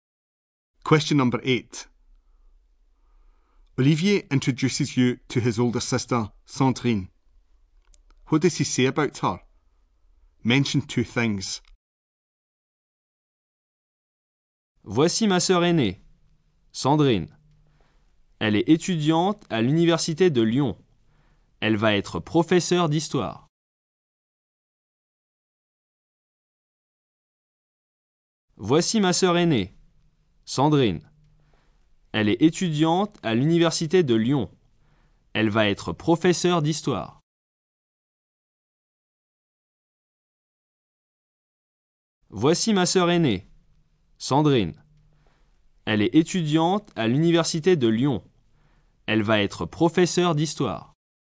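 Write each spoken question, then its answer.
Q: What does he say about her?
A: She is a student at Lyon University; she is going to be a history teacher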